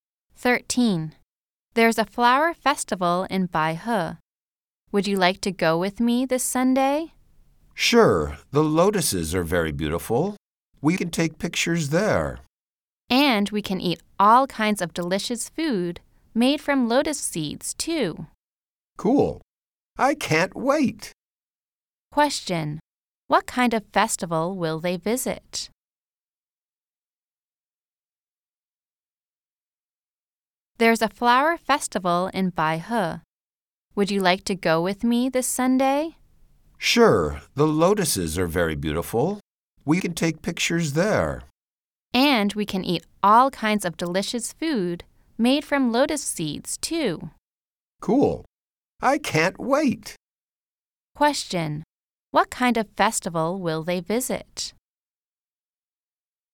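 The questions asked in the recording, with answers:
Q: Question.What kind of festival will they visit?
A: A lotus flower festival in Baihe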